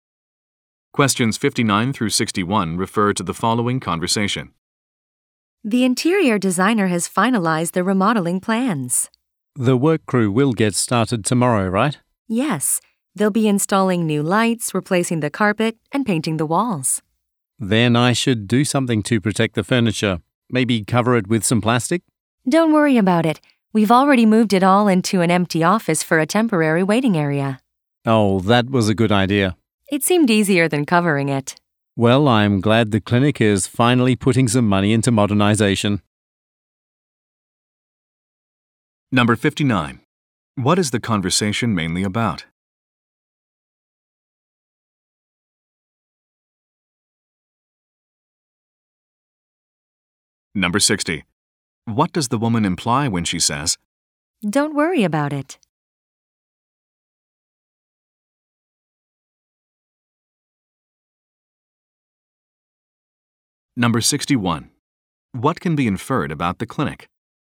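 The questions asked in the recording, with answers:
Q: What is the conversation mainly about?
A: Remodeling the clinic

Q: What can be inferred about the clinic?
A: It is investing in modernization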